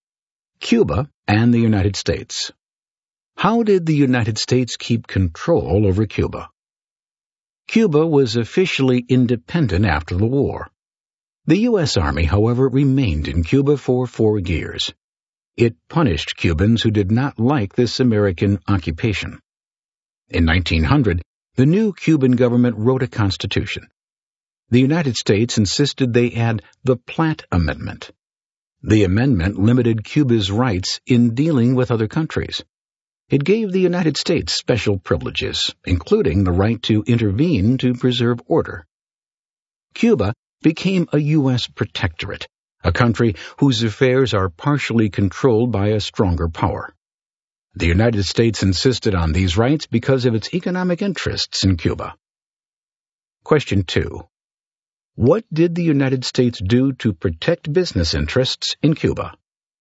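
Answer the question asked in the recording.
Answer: It made Cuba add the Platt Amendment, which made Cuba a U.S. protectorate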